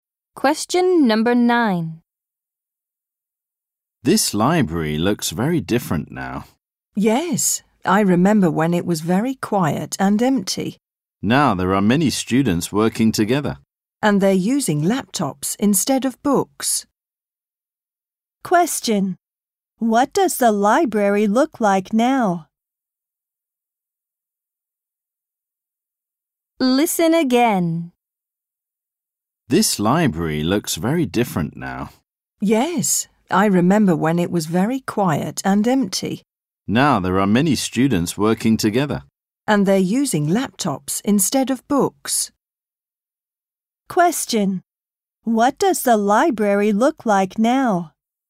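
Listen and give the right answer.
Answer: It is busy, with many students working together on laptops instead of books.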